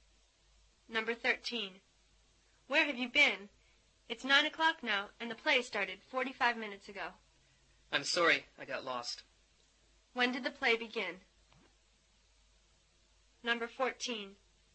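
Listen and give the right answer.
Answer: 8:15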